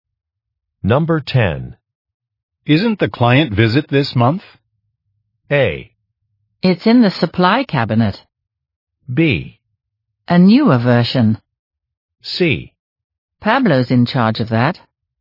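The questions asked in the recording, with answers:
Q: Isn't the client visit this month?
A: C: Pablo's in charge of that.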